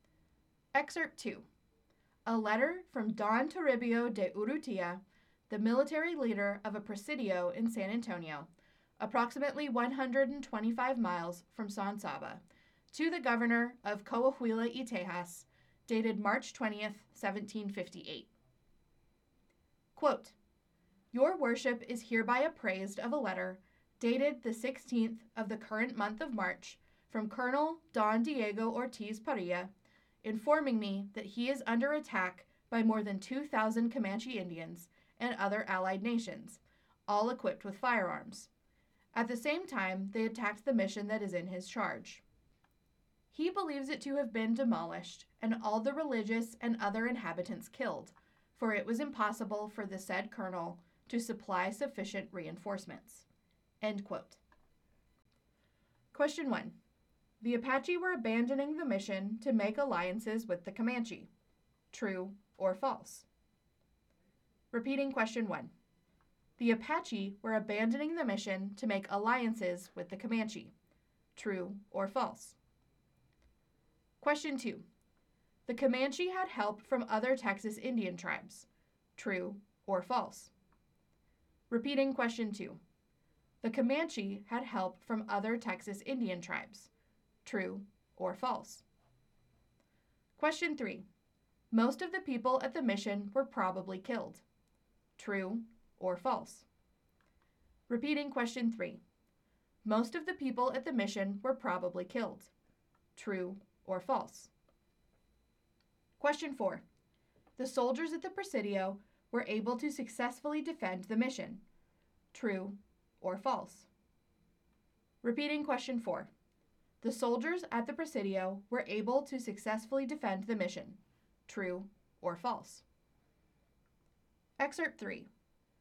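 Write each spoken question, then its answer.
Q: The Comanche had help from other Texas Indian tribes.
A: True

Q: Most of the people at the mission were probably killed.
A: True

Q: The soldiers at the Presidio were able to successfully defend the mission.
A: False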